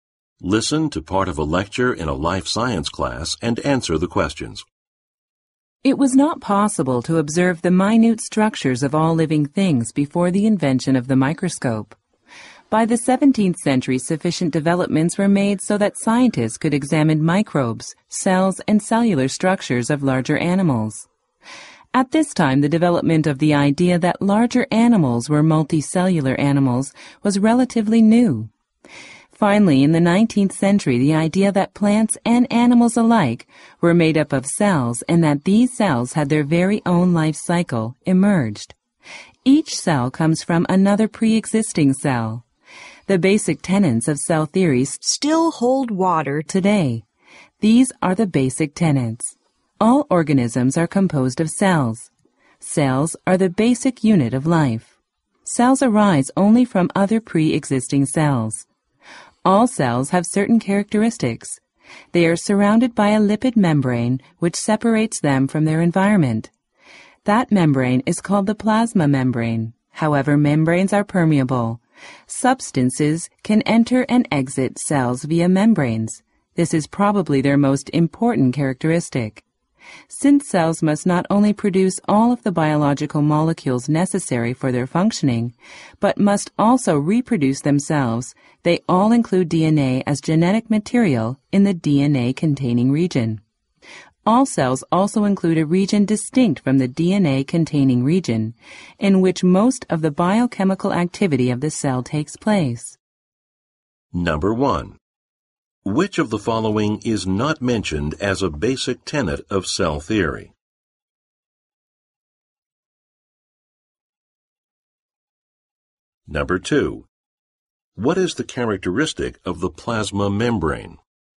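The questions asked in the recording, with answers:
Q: What is the characteristic of the plasma membrane?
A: It is permeable, so substances can enter and exit the cell through it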